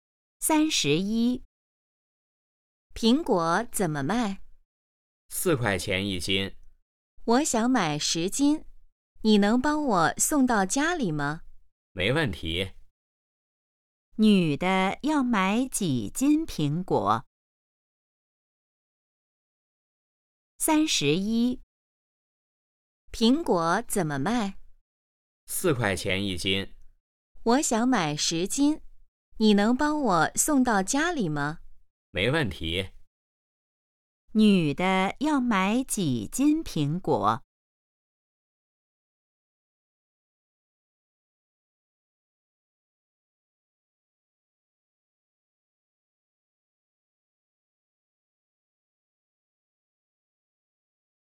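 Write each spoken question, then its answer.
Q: 女的要买几斤苹果?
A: 10斤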